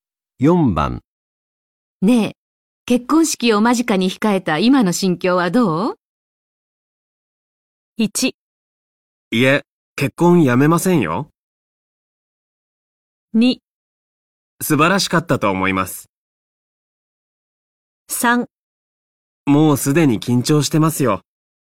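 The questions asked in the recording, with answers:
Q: 結婚式を間近に控えた今の心境はどう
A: 3: もうすでに緊張してますよ。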